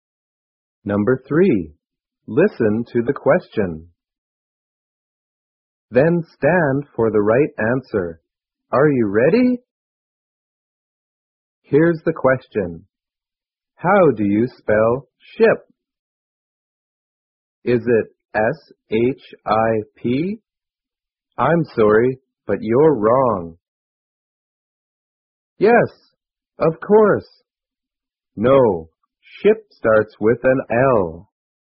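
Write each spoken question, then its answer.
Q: How do you spell ship? Is it S-H-I-P?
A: Yes, of course.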